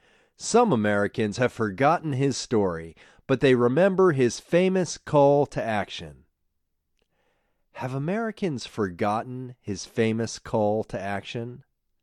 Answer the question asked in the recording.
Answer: No, they haven't forgotten his famous call to action.